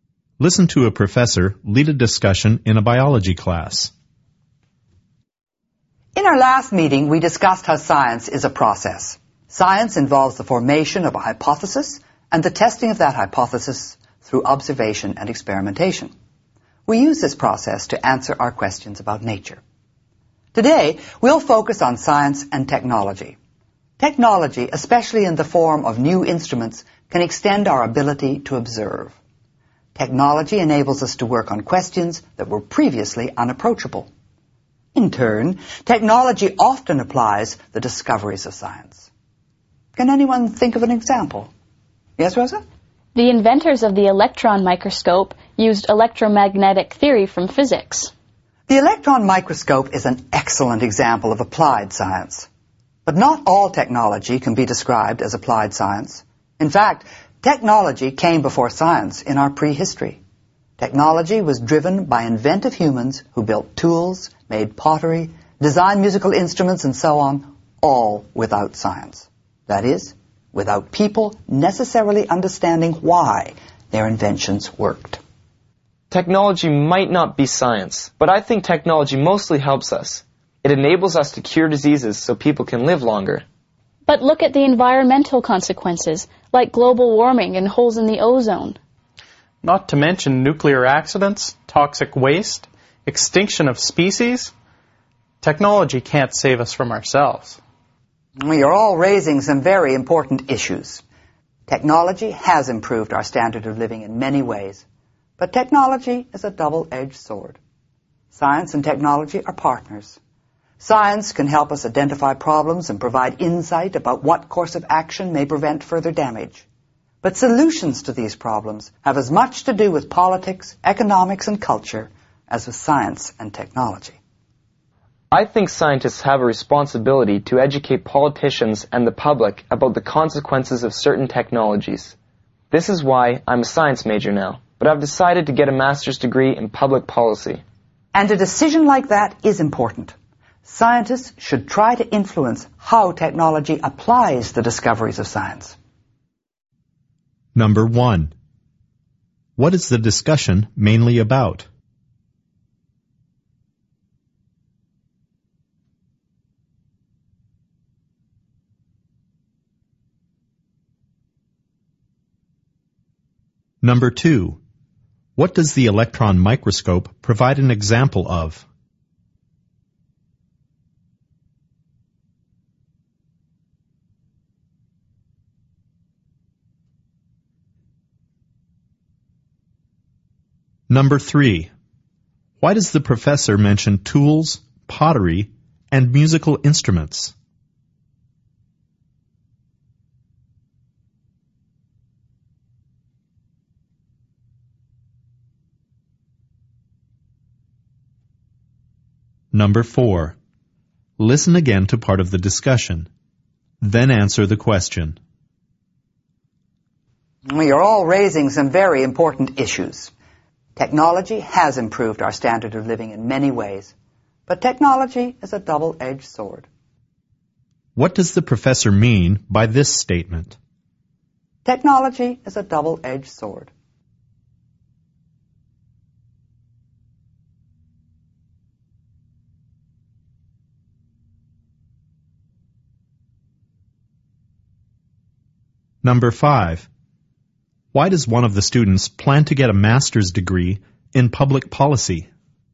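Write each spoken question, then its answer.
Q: What is the discussion mainly about?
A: The relationship between science and technology

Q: What does the electron microscope provide an example of?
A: Applied science (technology using scientific discoveries)

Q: Why does the professor mention tools, pottery, and musical instruments?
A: To show that technology came before science and is not always applied science

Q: What does the professor mean by this statement?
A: Technology has both good and bad effects

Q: Why does one of the students plan to get a master's degree in public policy?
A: To educate politicians and the public about the consequences of technologies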